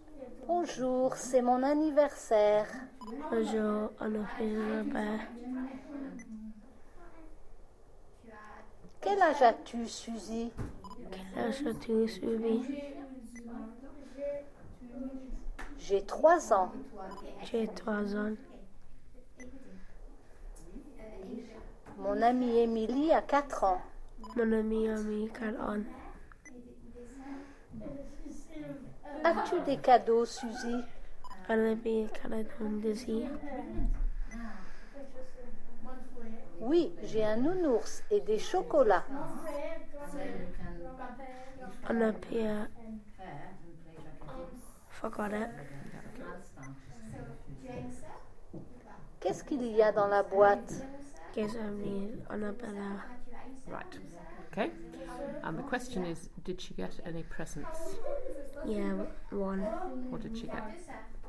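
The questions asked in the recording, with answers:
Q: did she get any presents?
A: Yes

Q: What did she get?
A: A teddy bear and chocolates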